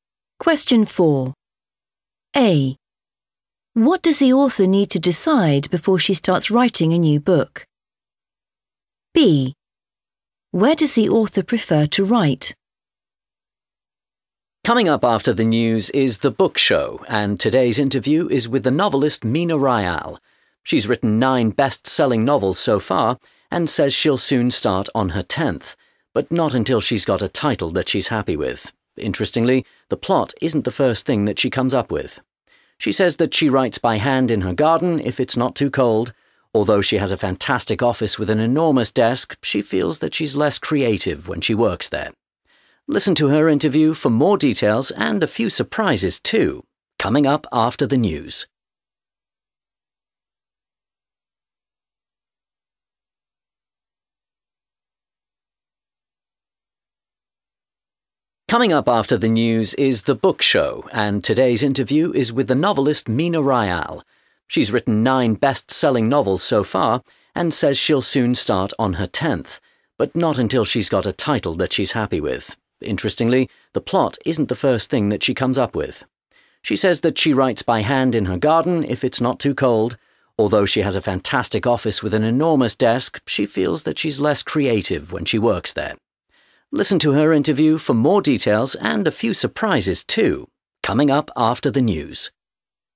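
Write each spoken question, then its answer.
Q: What does the author need to decide before she starts writing a new book?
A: the title

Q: Where does the author prefer to write?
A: in her garden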